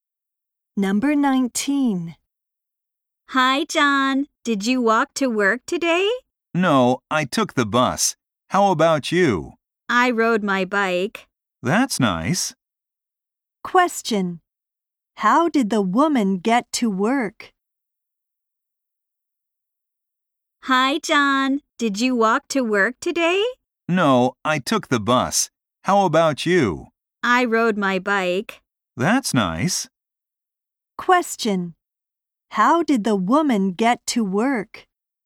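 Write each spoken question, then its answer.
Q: How did the woman get to work?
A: She rode her bike.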